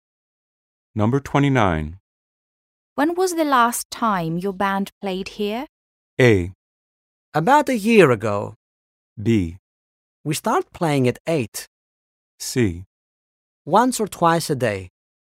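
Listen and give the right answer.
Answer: A: About a year ago.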